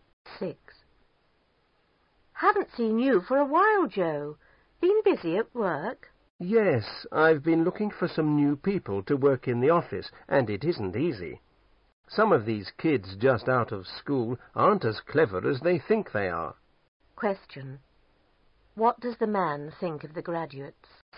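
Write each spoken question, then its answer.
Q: What does the man think of the graduates?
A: They are not as clever as they think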